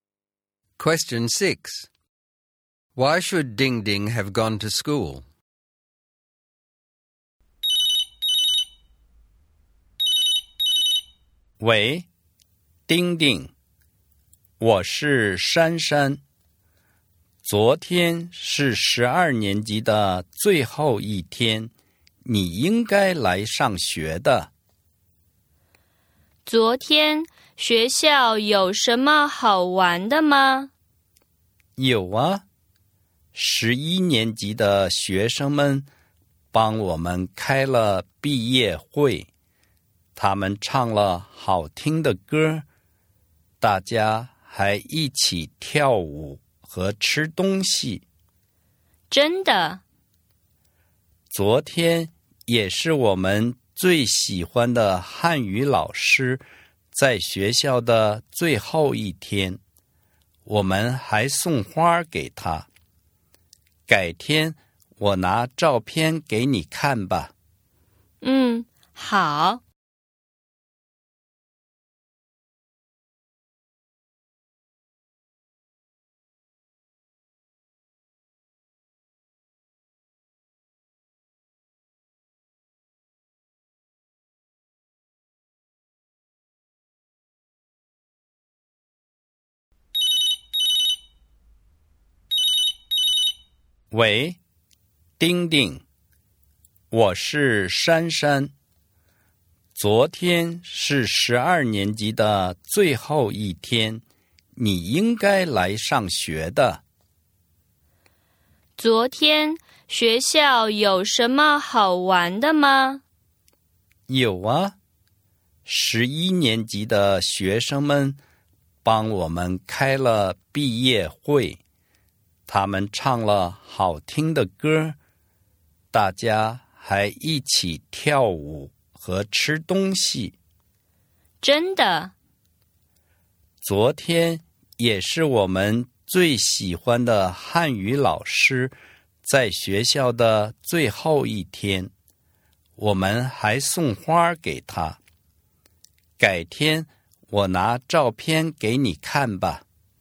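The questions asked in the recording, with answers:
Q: Why should Ding Ding have gone to school?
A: It was the last day of Year 12: Year 11 students held a graduation party with singing, dancing and food, and it was the favourite Chinese teacher's last day, so they gave him flowers.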